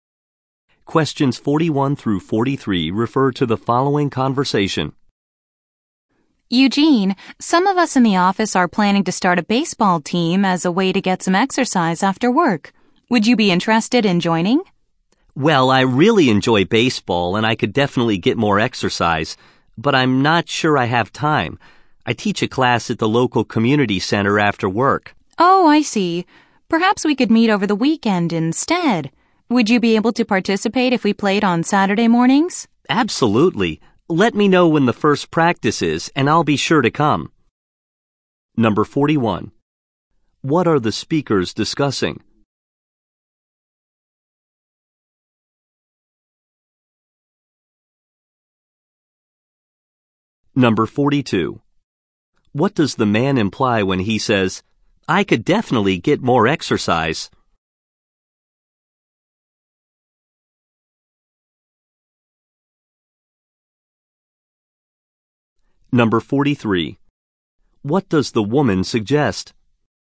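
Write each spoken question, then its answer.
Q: What are the speakers discussing?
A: Starting an office baseball team.

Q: what does the woman suggest?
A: Playing on Saturday mornings.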